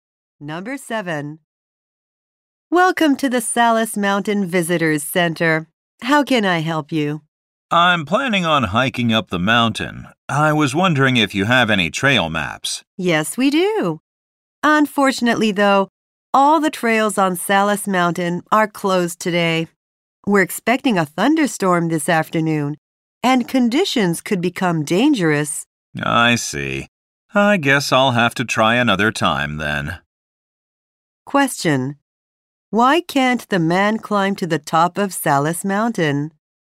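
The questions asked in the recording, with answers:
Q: Why can't the man climb to the top of Salus Mountain?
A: The trails are closed because a thunderstorm is expected.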